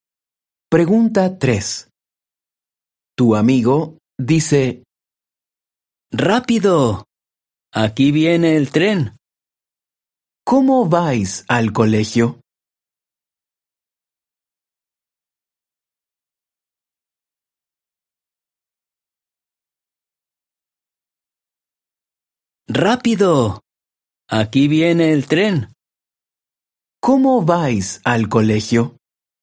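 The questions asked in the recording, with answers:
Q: ¿Cómo vais al colegio?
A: En tren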